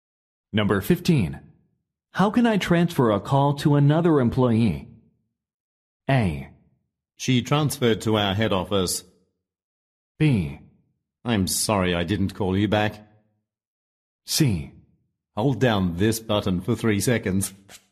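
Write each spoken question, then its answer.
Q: How can I transfer a call to another employee?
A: C: Hold down this button for 3 seconds.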